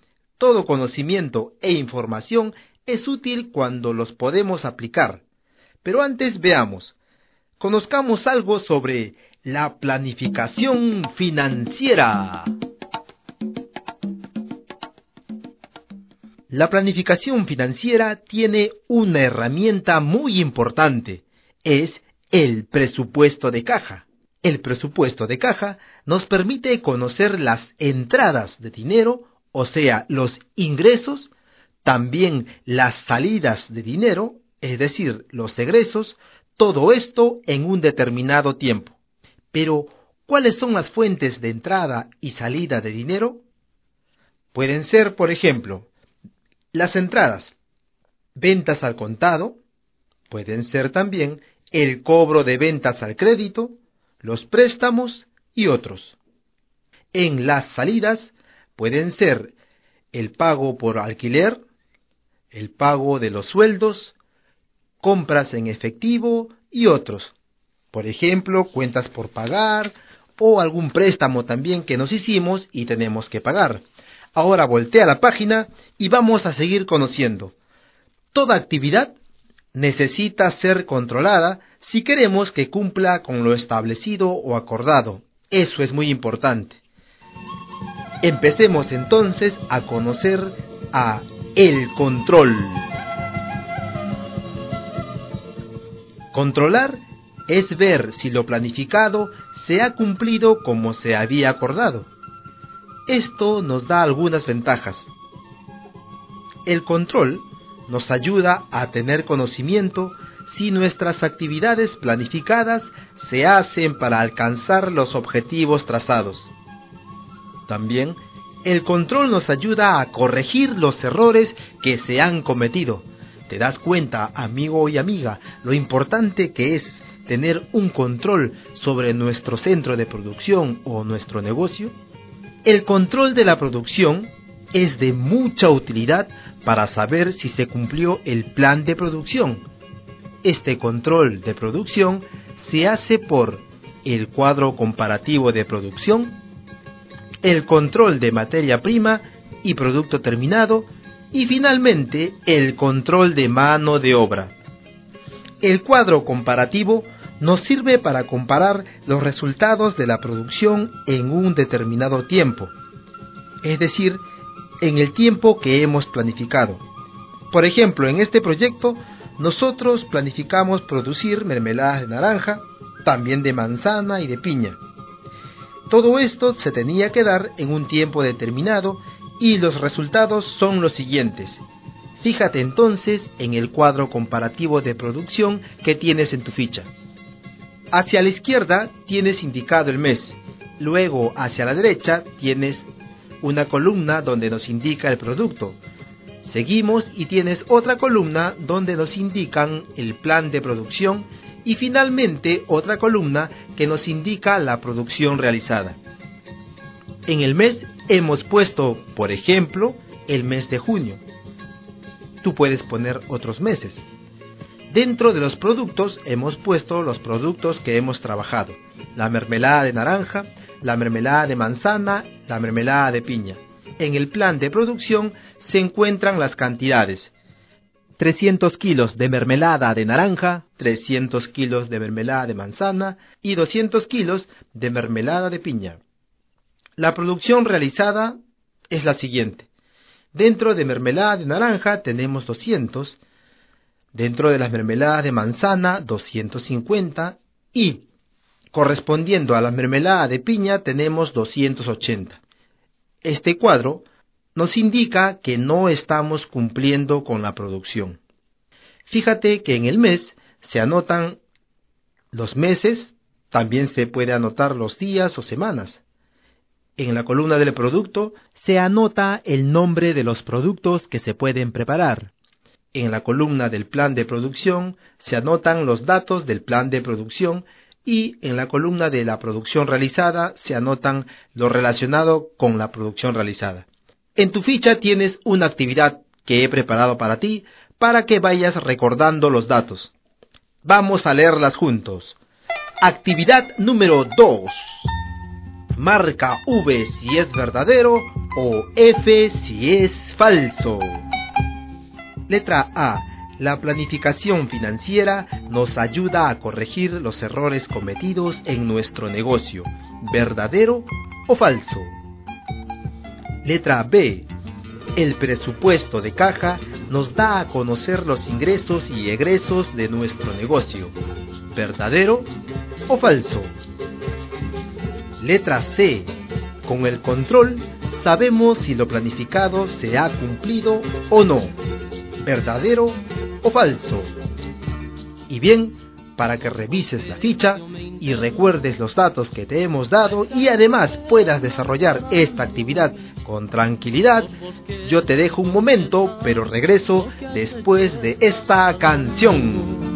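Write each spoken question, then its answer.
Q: Letra A. La planificación financiera nos ayuda a corregir los errores cometidos en nuestro negocio.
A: Falso

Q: El presupuesto de caja nos da a conocer los ingresos y egresos de nuestro negocio.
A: Verdadero

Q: Con el control sabemos si lo planificado se ha cumplido o no.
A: Verdadero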